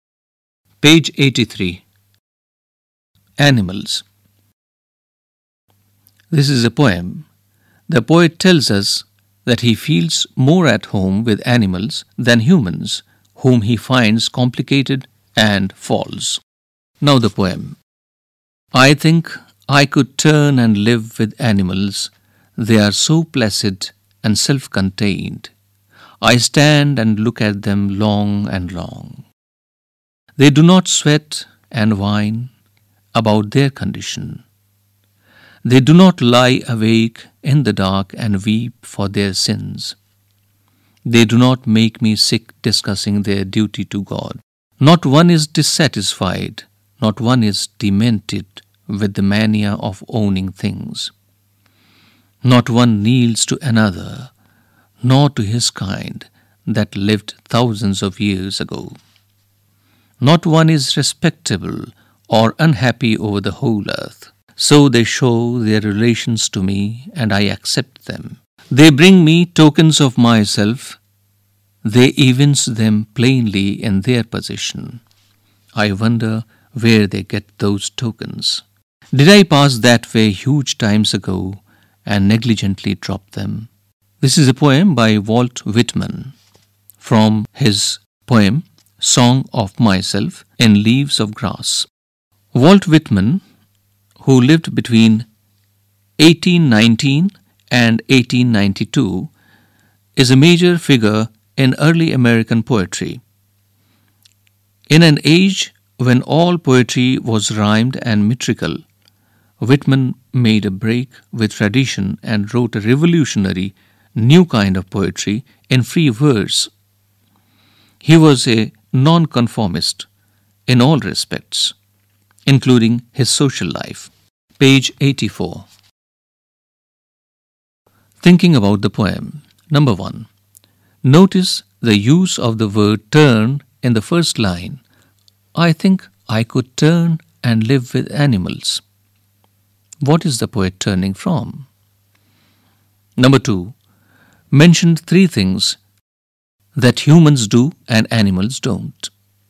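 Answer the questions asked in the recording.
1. Humans, whom he finds complicated and false
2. Sweat and whine about their condition; lie awake and weep for their sins; discuss their duty to God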